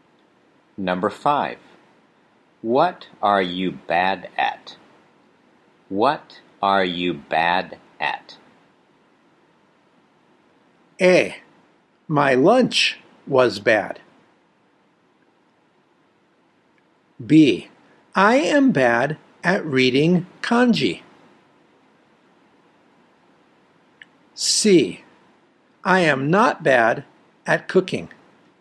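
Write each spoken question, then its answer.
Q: What are you bad at?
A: B: I am bad at reading kanji.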